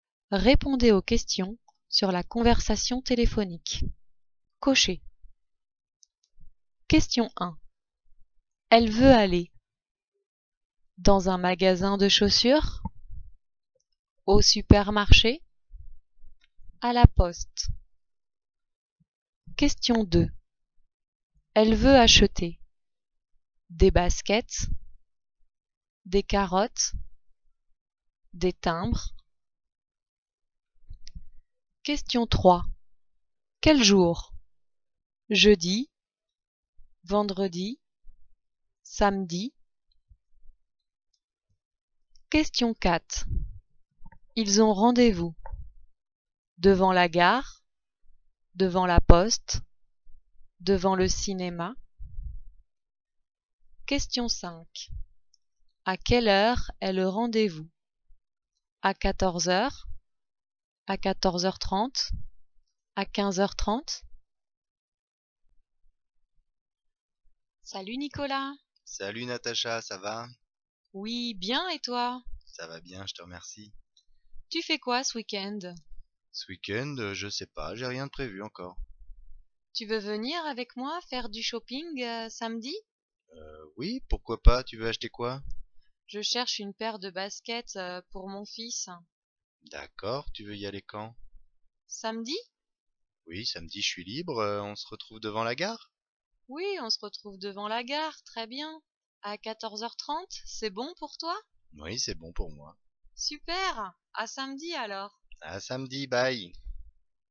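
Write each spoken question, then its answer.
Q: Elle veut aller dans un magasin de chaussures, au supermarché, à la poste.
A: dans un magasin de chaussures

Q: Elle veut acheter des baskets, des carottes, des timbres.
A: des baskets

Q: Quel jour? Jeudi, vendredi, samedi.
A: samedi

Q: Ils ont rendez-vous devant la gare, devant la poste, devant le cinéma.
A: devant la gare

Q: À quelle heure est le rendez-vous?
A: À 14h30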